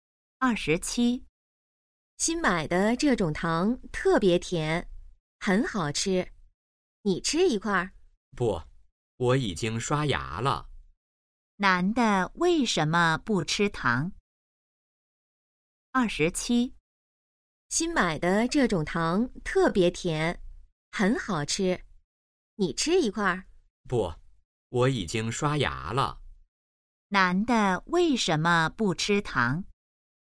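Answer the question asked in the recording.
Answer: 已经刷牙了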